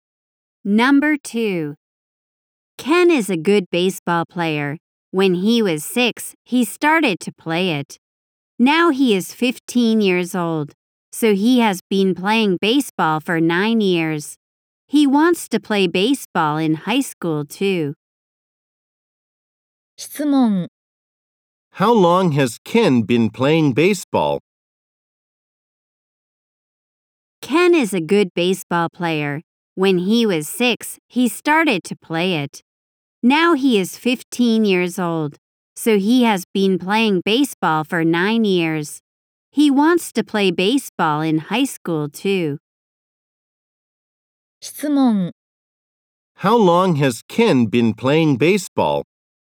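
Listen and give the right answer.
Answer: For 9 years.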